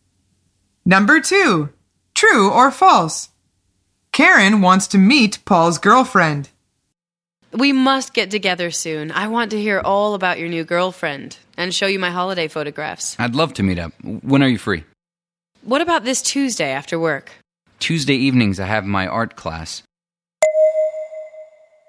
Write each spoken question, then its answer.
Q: True or false? Karen wants to meet Paul's girlfriend.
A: The answer is false. She says, I want to hear all about your new girlfriend.